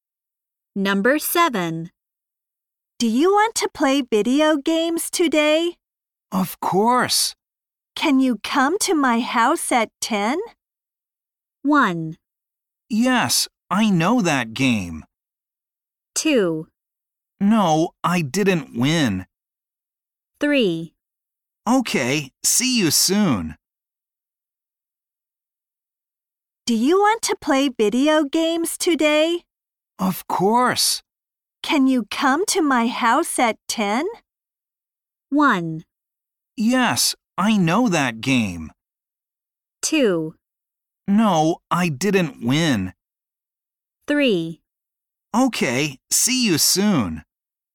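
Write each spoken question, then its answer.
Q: Can you come to my house at 10?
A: 3: Okay, see you soon.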